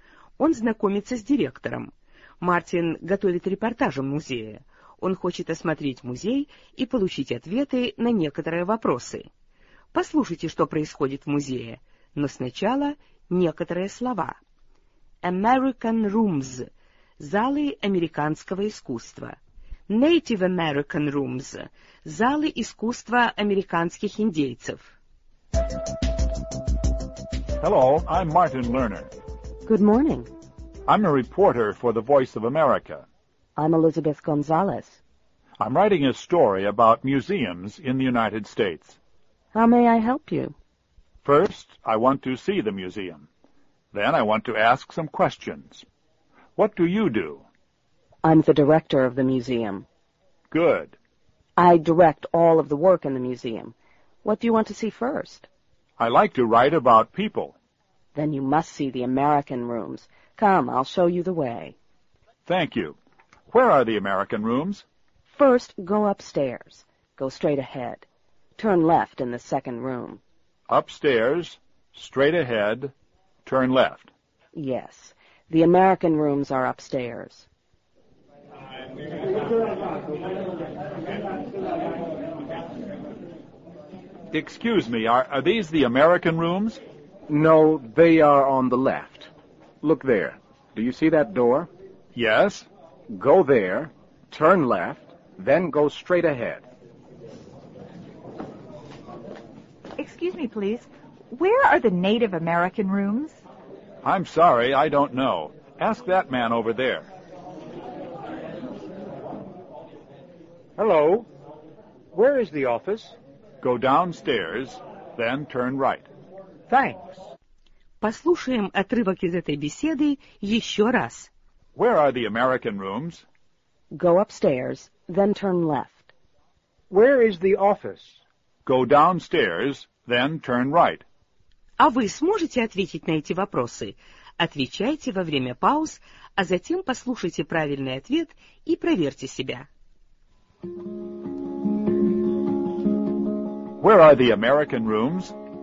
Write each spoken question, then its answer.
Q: Where are the American rooms?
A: Go upstairs, then turn left.